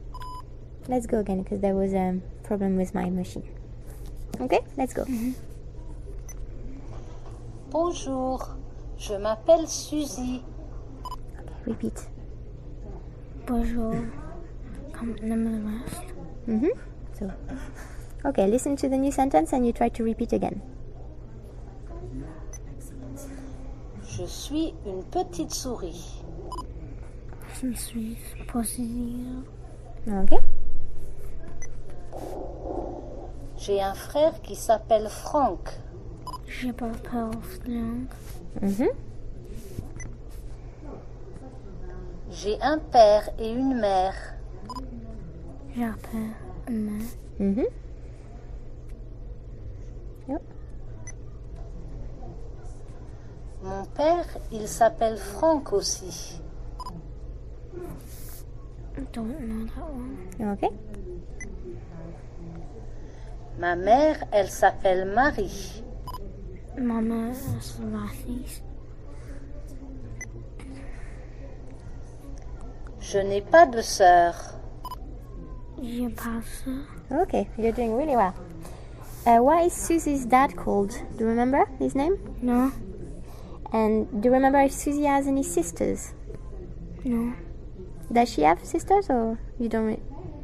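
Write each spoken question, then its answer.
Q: Why is Susie's dad called?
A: Franck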